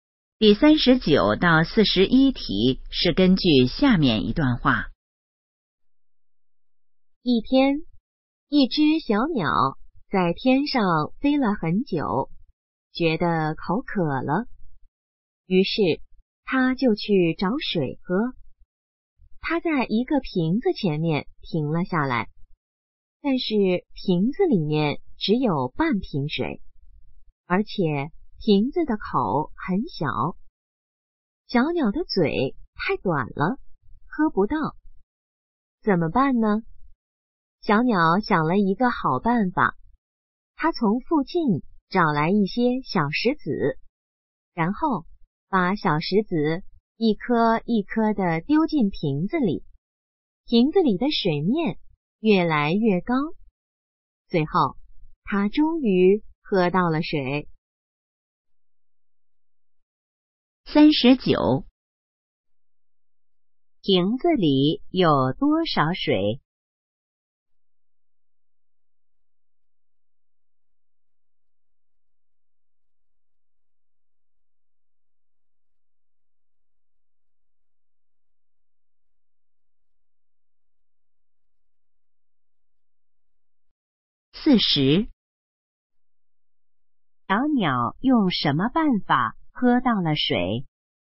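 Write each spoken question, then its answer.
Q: 瓶子里有多少水?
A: 半瓶

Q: 小鸟用什么办法喝到了水?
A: 往瓶子里丢小石子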